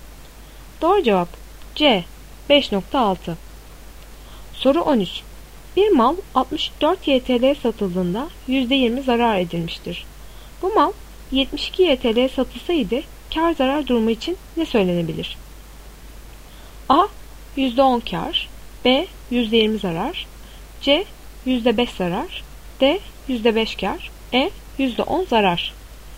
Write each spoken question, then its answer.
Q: Bu mal 72 YTL'ye satılsaydı kar zarar durumu için ne söylenebilir?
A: Doğru cevap E. %10 zarar.